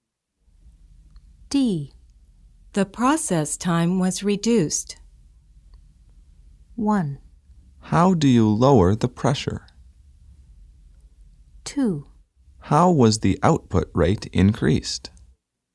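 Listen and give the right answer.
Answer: 2: How was the output rate increased?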